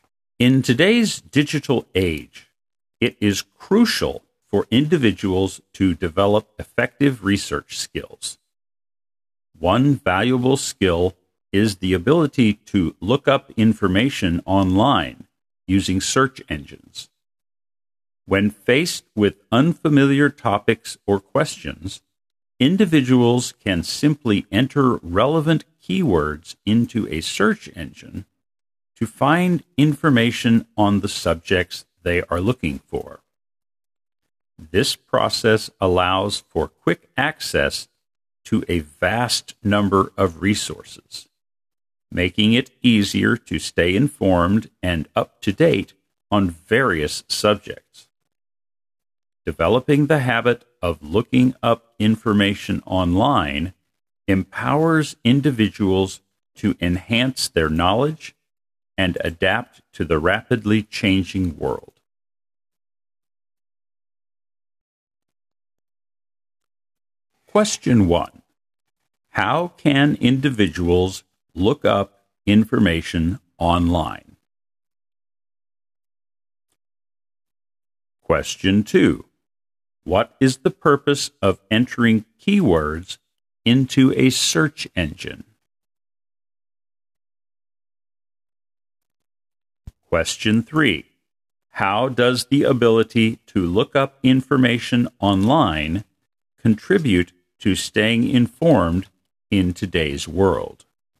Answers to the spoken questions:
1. By using search engines.
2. To find information on the subjects you are looking for.
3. It empowers individuals to enhance their knowledge and adapt to the rapidly changing world.